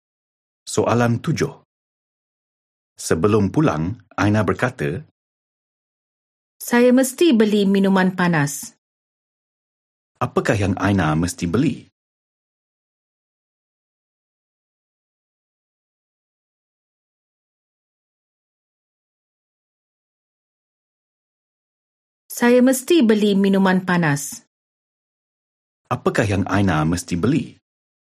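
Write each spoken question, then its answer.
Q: Apakah yang Aina mesti beli?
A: Minuman panas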